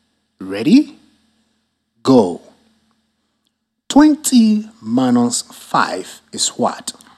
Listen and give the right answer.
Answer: 15.